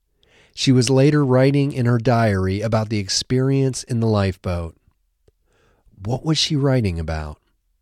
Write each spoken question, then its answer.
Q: What was she writing about?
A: She was writing about her experience in the lifeboat.